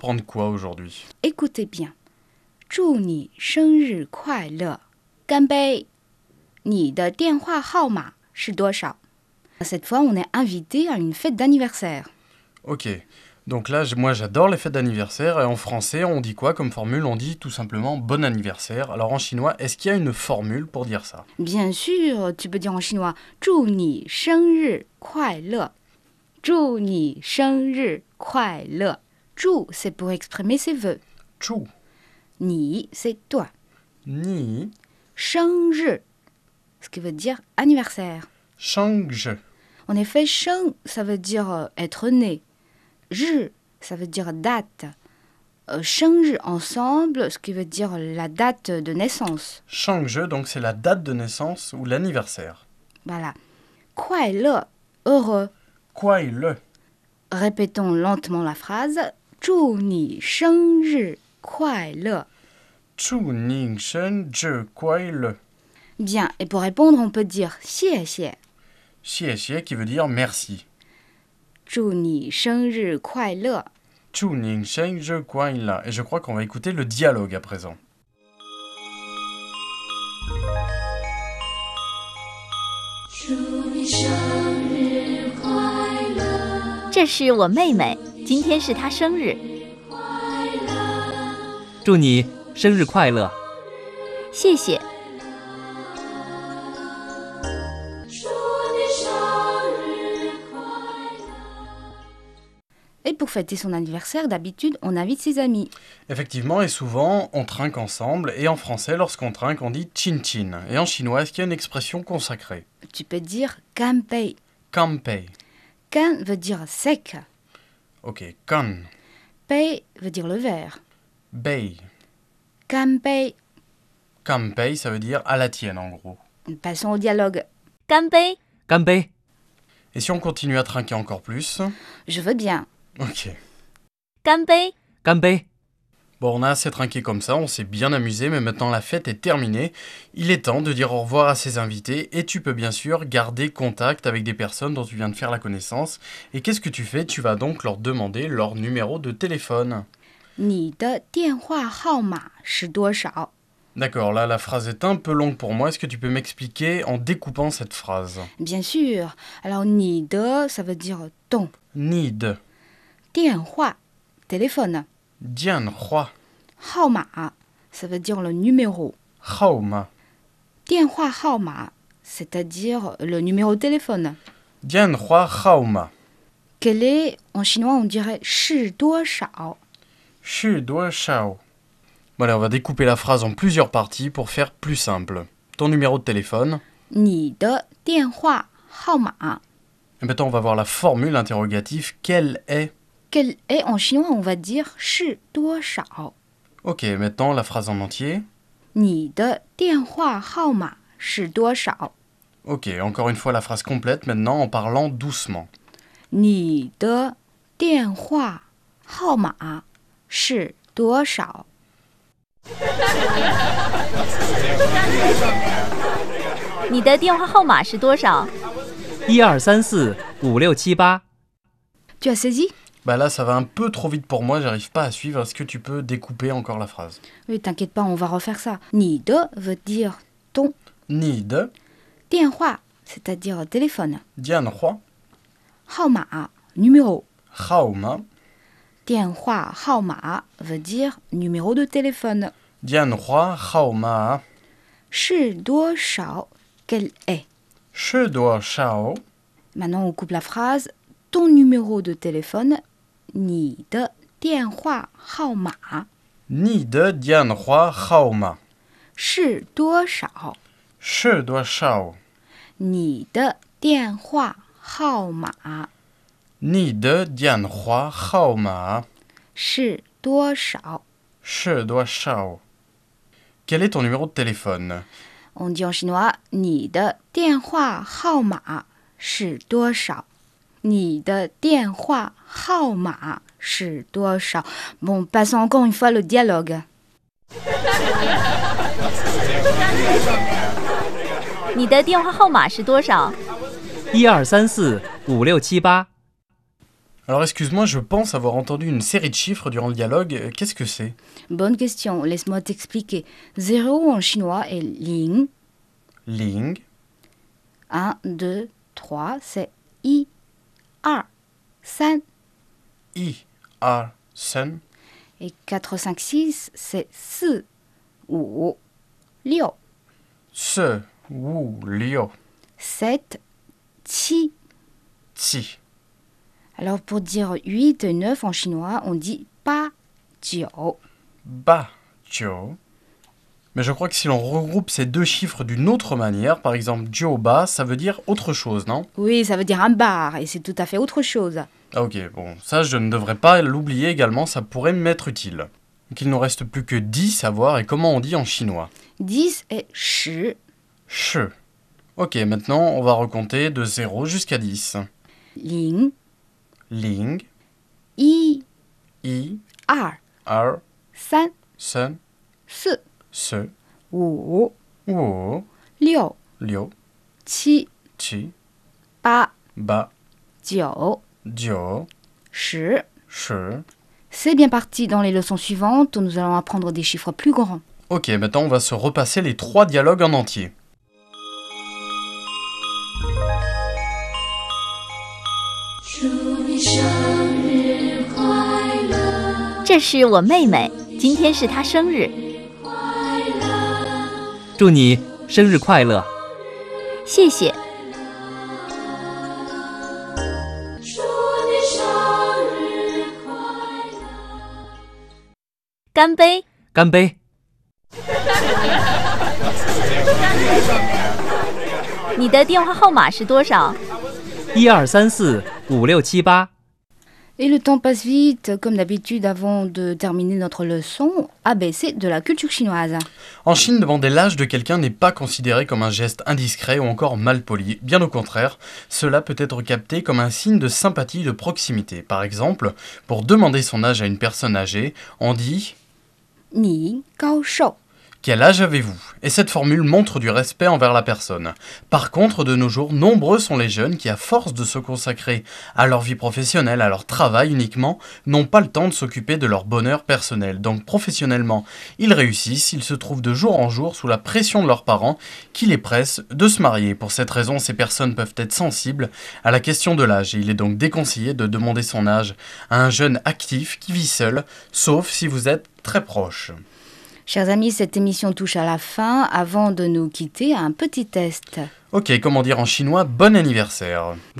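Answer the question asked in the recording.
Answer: 祝你生日快乐 (zhu ni shengri kuaile)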